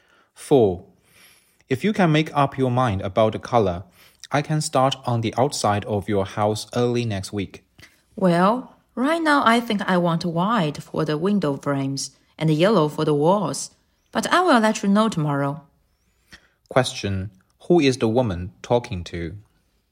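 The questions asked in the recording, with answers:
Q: Who is the woman talking to?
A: A house painter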